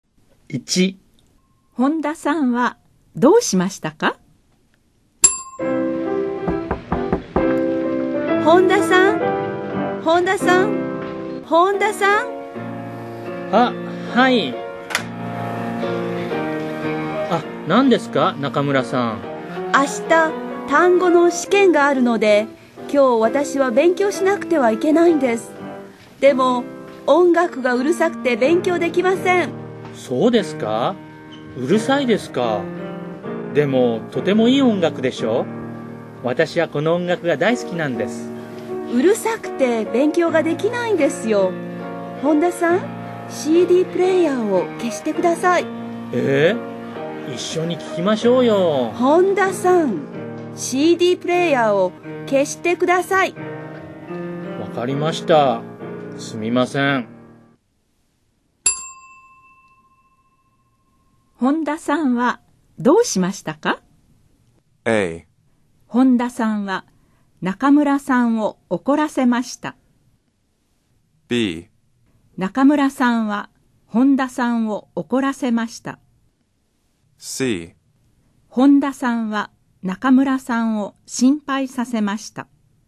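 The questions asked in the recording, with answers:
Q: 本田さんはどうしましたか?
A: A: 本田さんは中村さんを怒らせました。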